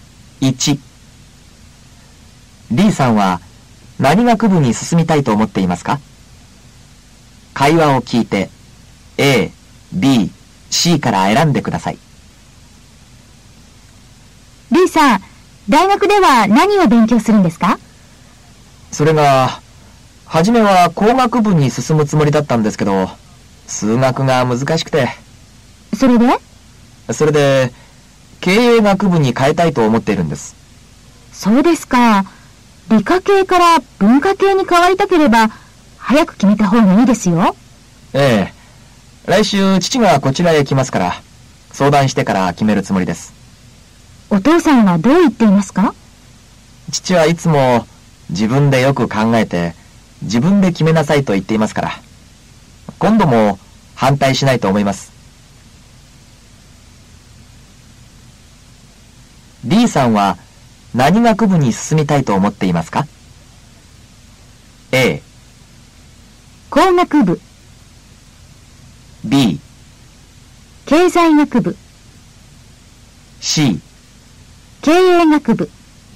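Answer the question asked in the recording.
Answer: C: 経営学部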